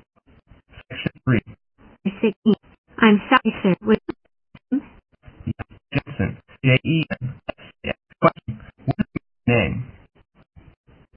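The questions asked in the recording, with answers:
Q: What is your name?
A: Jensen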